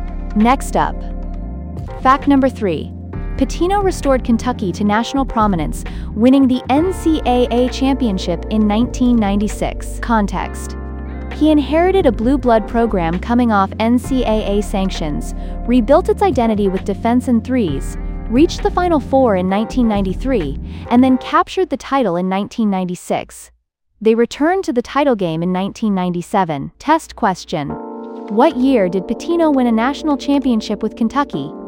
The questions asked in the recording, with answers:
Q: What year did Pitino win a national championship with Kentucky?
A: 1996.